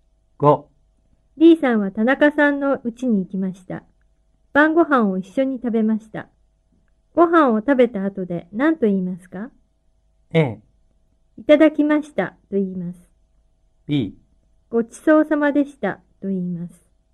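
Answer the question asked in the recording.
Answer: B: ごちそうさまでしたと言います。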